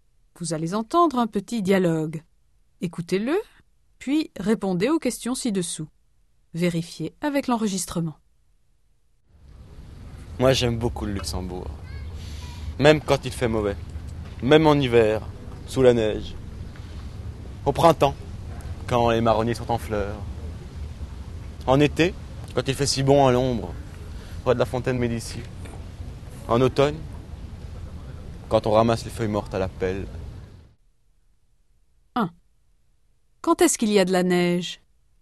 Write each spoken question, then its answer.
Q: Quand est-ce qu'il y a de la neige?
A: Eh bien, en hiver, évidemment.